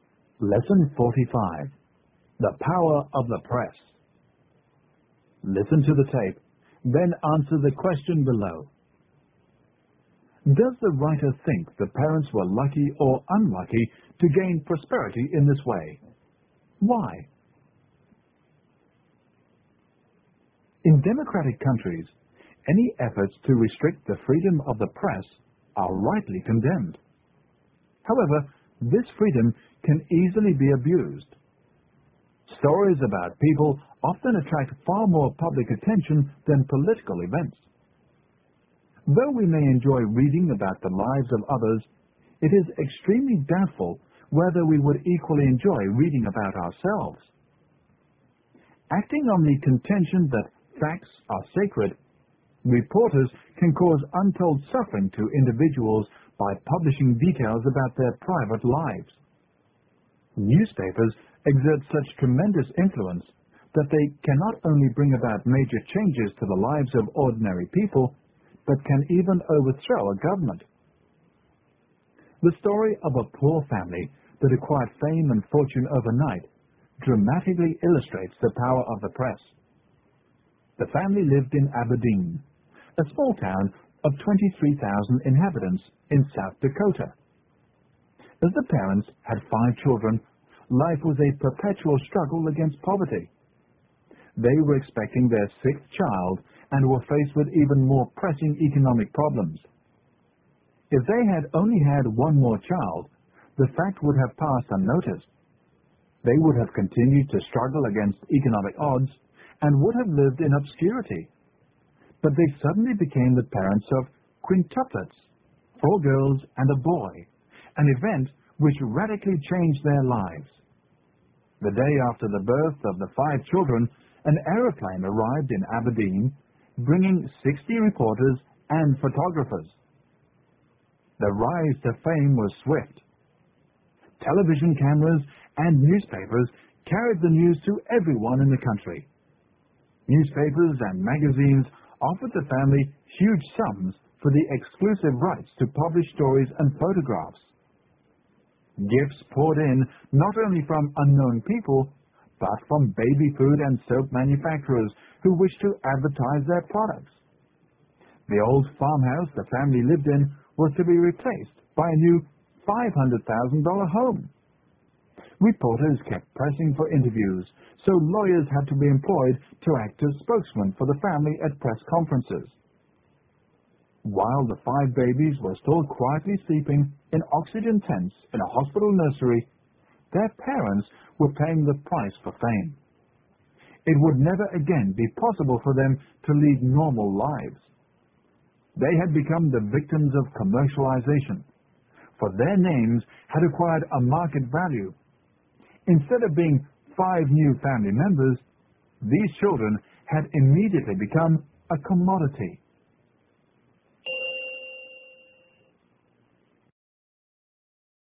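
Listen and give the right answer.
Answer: Unlucky: they could never again lead normal lives and became victims of commercialization.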